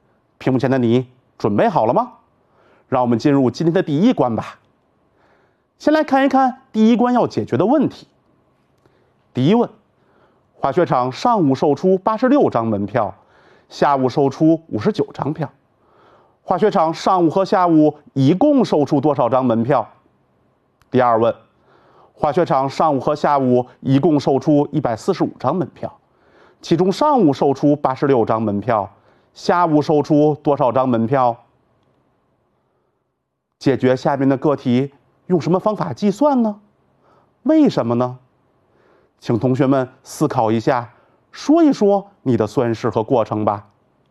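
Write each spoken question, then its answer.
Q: 滑雪场上午售出86张门票,下午售出59张票,滑雪场上午和下午一共售出多少张门票?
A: 145张

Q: 滑雪场上午和下午一共售出145张门票,其中上午售出86张门票,下午售出多少张门票?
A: 59张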